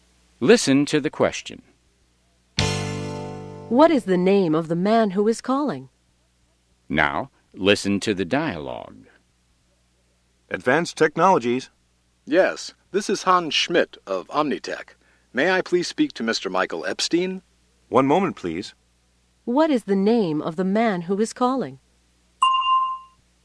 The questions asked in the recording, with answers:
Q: What is the name of the man who is calling?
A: His name is Hans Schmidt.